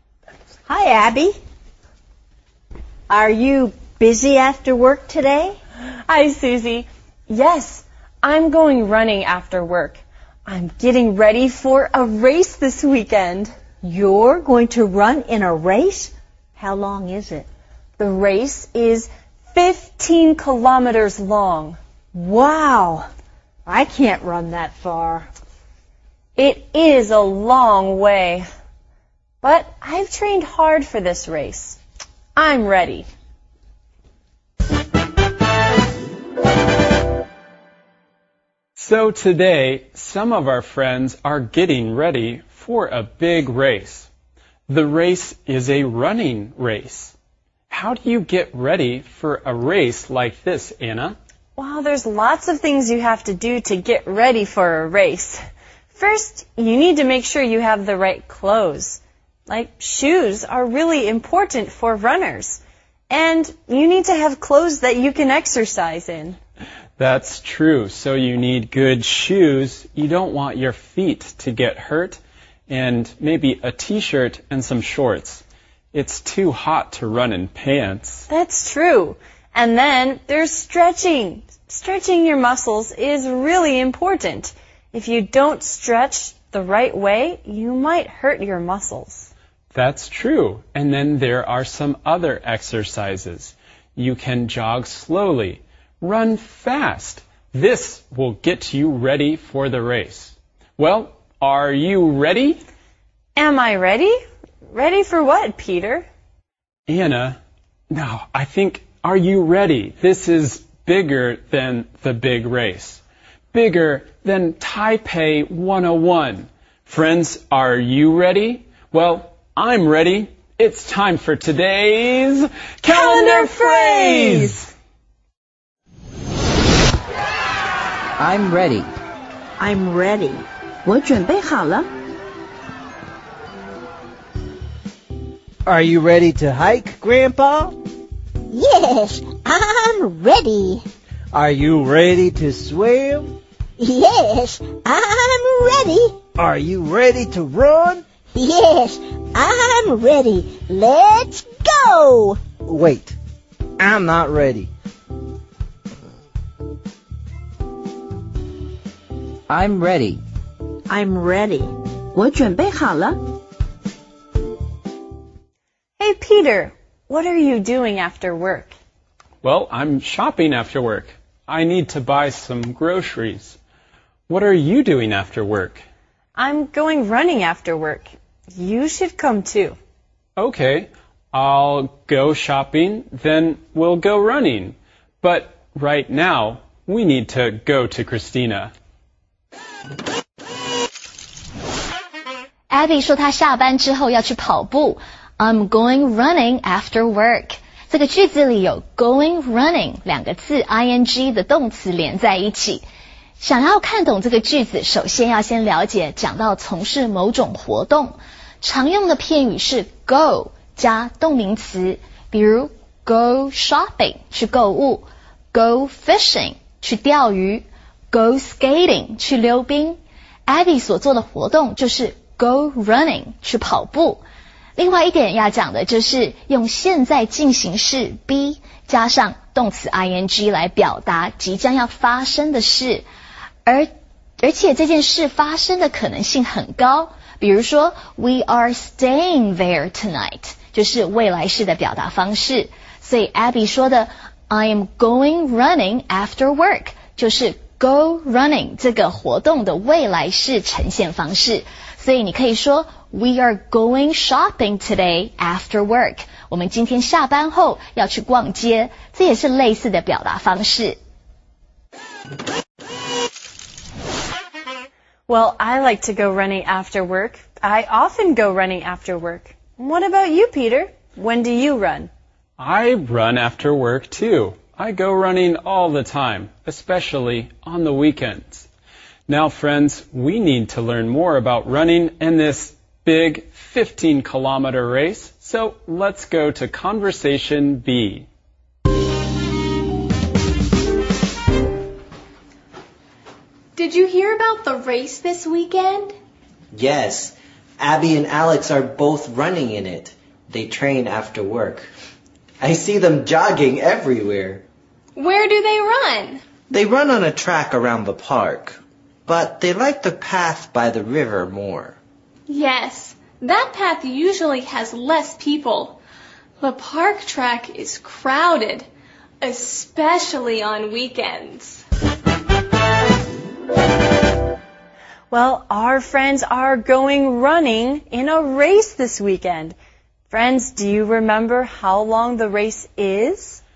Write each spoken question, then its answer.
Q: Friends, do you remember how long the race is?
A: The race is 15 kilometers long.